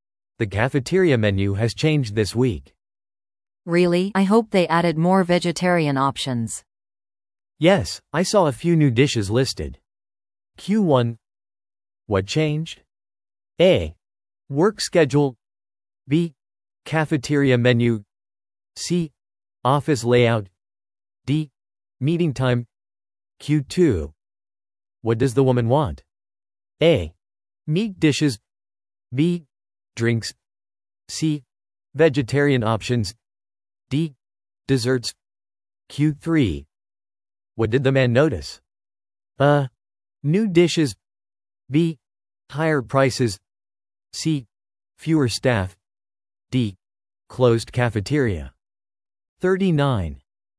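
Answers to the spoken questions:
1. B: Cafeteria menu.
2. C: Vegetarian options.
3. A: New dishes.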